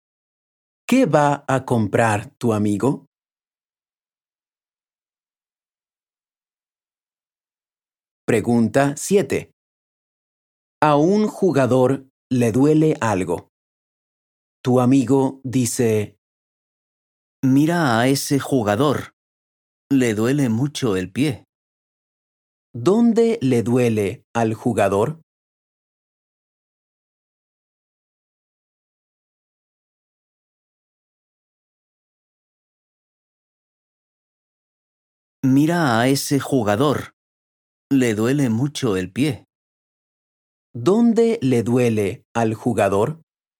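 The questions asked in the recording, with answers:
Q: ¿Dónde le duele al jugador?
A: En el pie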